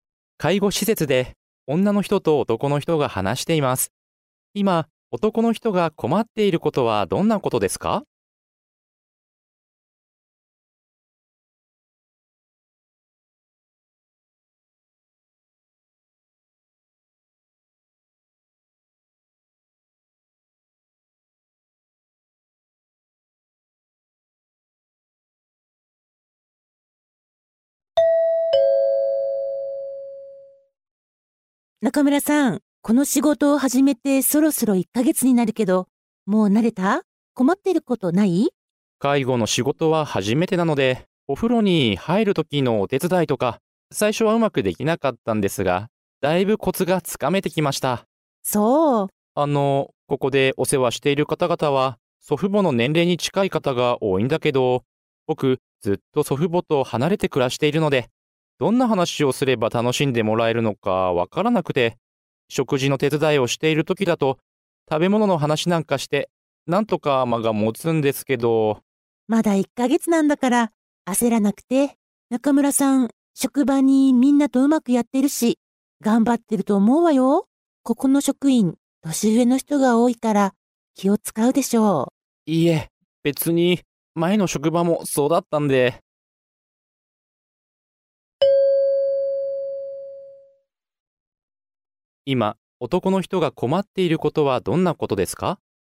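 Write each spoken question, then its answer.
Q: 今男の人が困っていることはどんなことですか?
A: お世話している方々(お年寄り)とどんな話をすれば楽しんでもらえるかわからないこと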